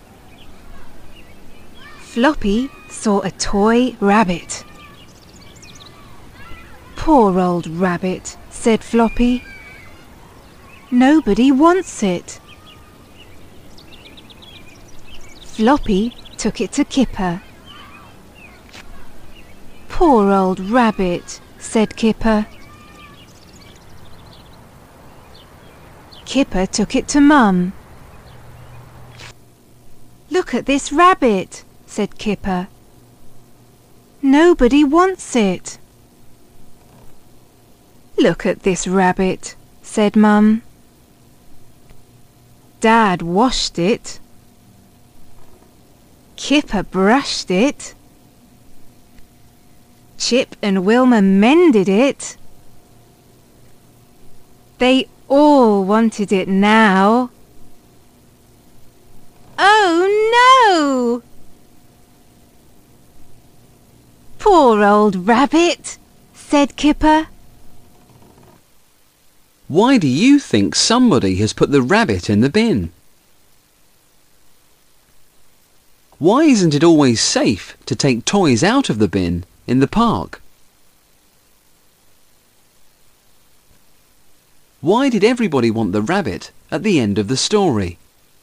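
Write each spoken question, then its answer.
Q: Why did everybody want the rabbit at the end of the story?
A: Because it had been washed, brushed and mended, so it looked nice again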